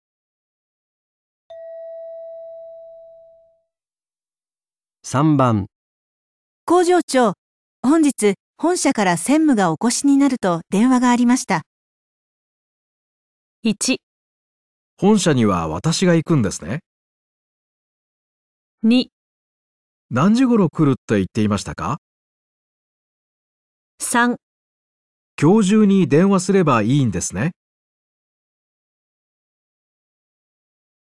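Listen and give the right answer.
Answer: 何時頃来るって言っていましたか

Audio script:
3、工場長、本日、本社から専務がお越しになると電話がありました。

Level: N2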